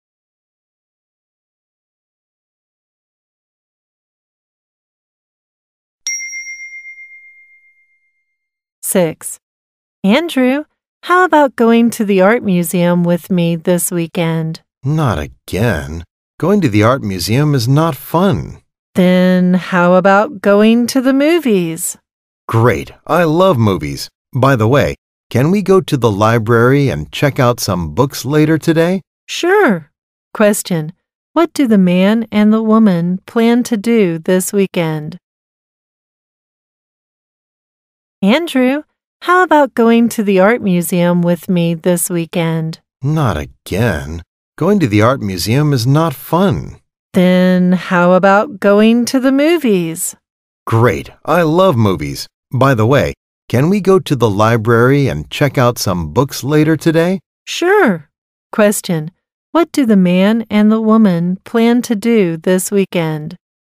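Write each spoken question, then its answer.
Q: What do the man and the woman plan to do this weekend?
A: Go to the movies.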